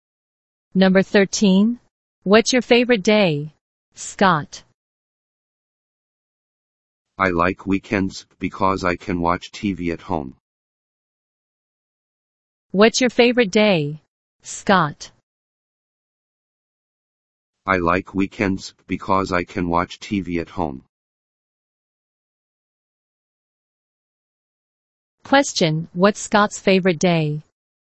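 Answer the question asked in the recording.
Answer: Weekends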